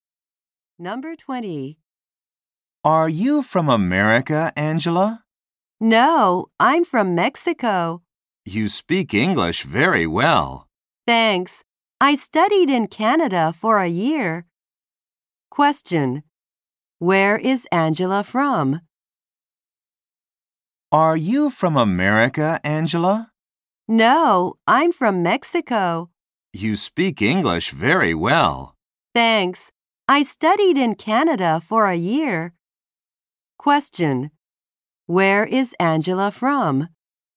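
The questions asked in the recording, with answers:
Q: Where is Angela from?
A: Mexico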